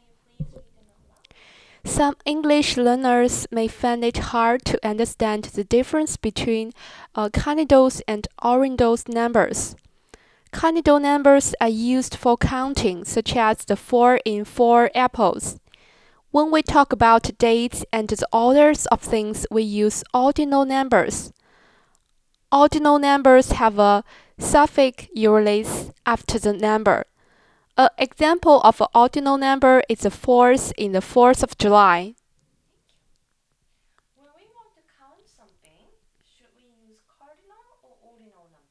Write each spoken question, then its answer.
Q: When we want to count something, should we use cardinal or ordinal numbers?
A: If you want to count a thing, you need to use a cardinal number.